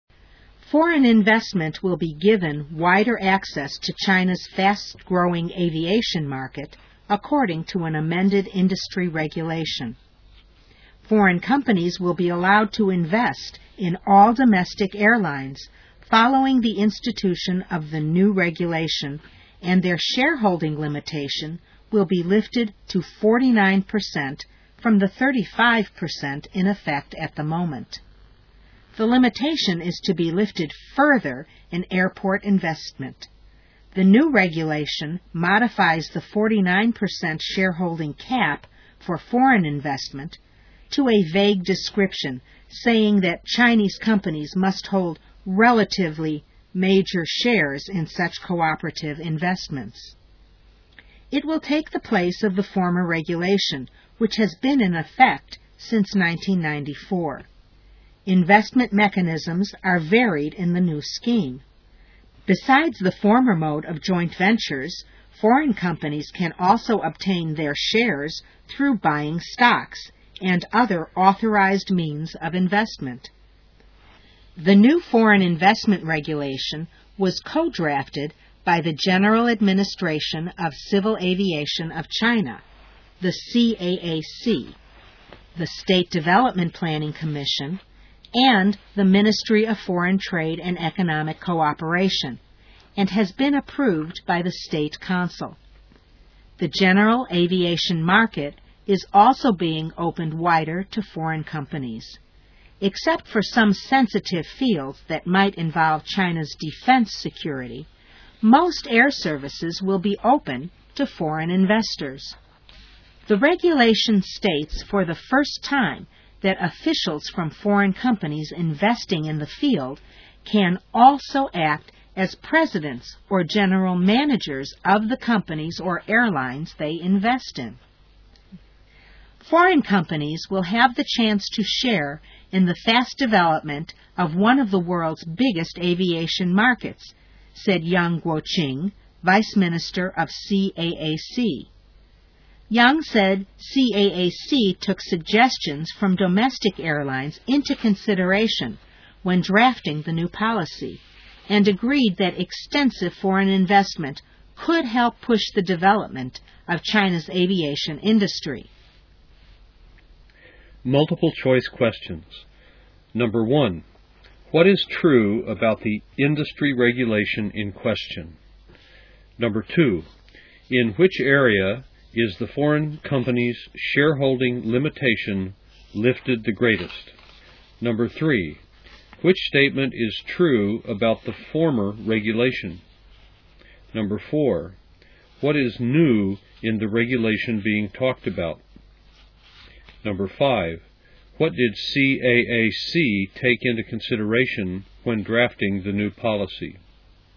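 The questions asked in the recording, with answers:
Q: in which area is the foreign company's shareholding limitation lifted the greatest?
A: airport investment

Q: what did CAAC take into consideration when drafting the new policy?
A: suggestions from domestic airlines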